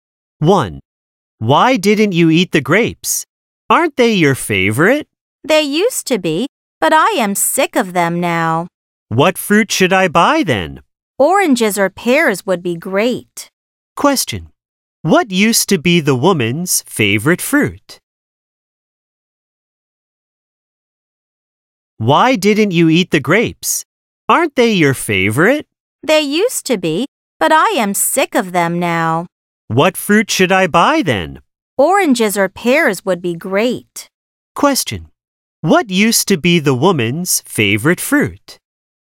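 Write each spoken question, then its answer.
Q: What used to be the woman's favorite fruit?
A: Grapes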